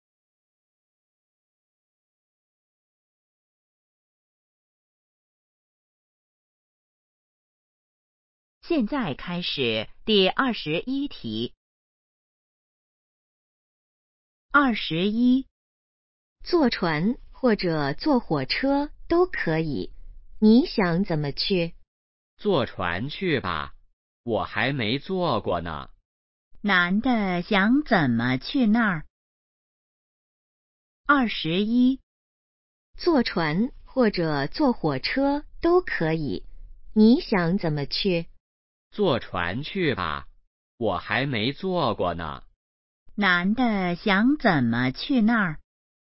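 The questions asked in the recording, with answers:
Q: 男的想怎么去那儿?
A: 坐船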